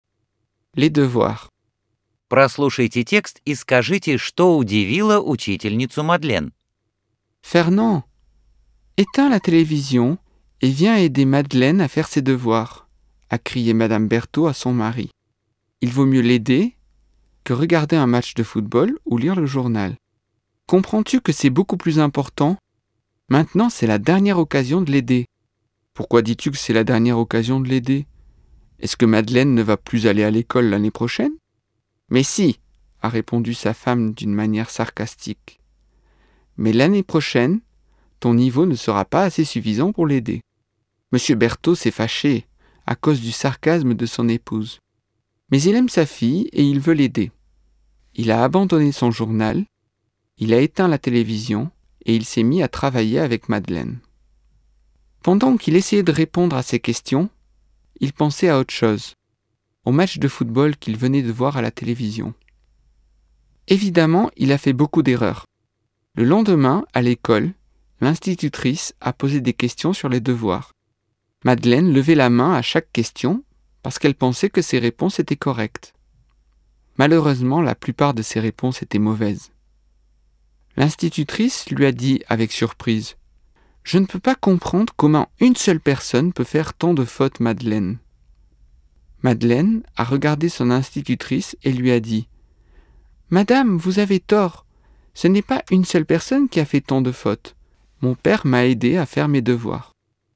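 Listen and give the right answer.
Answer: Что один человек может сделать так много ошибок в домашнем задании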